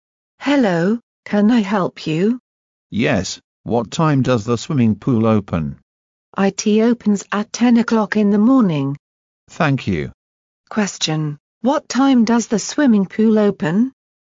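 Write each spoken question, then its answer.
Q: Question, what time does the swimming pool open?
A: At 10 o'clock in the morning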